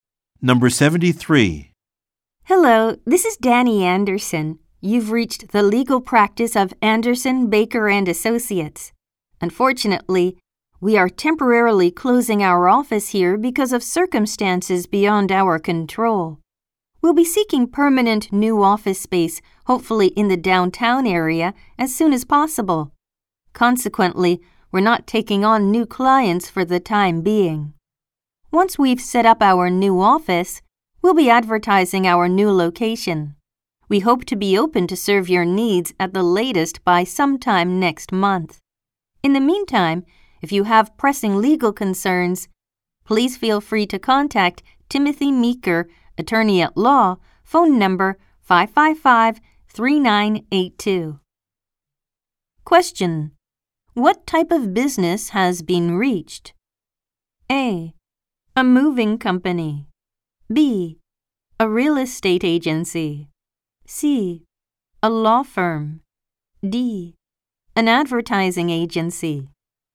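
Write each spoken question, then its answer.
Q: What type of business has been reached?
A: C: A law firm.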